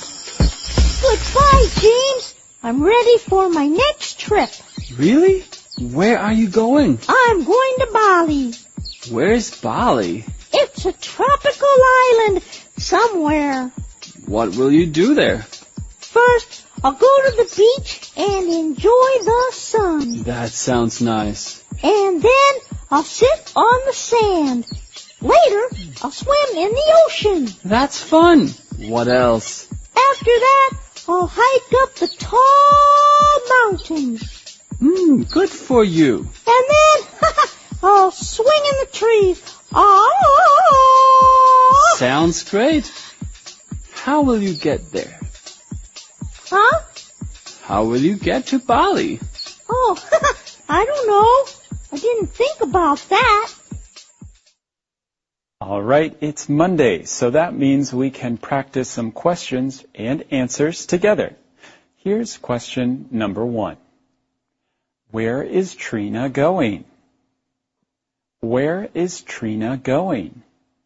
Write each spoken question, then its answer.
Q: Where is Trina going?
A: She is going to Bali.